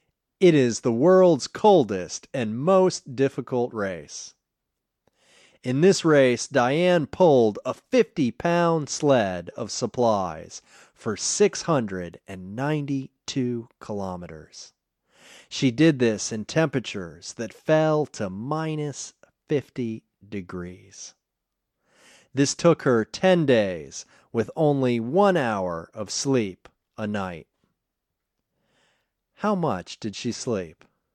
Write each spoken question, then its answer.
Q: How much did she sleep?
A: She slept only 1 hour a night for 10 days.